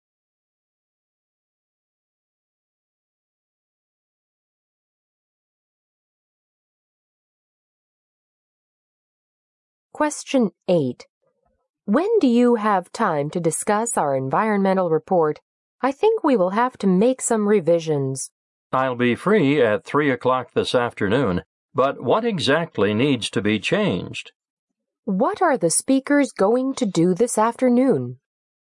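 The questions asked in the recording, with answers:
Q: What are the speakers going to do this afternoon?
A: Discuss revisions to their environmental report.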